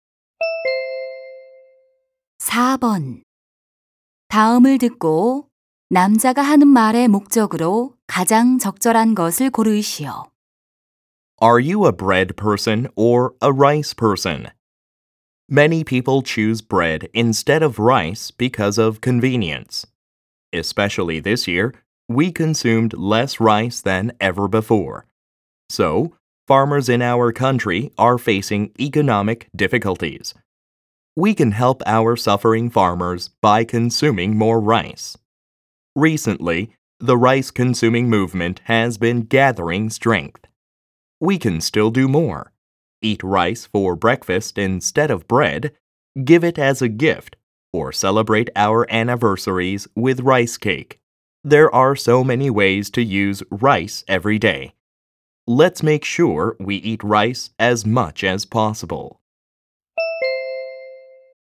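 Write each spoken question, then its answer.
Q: 다음을 듣고 남자가 하는 말의 목적으로 가장 적절한 것을 고르시오.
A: 쌀 소비를 늘리자고 권장하려고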